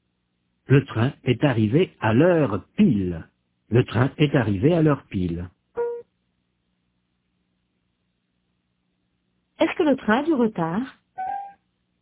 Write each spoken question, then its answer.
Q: Est-ce que le train a du retard ?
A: Non, il est arrivé à l'heure pile.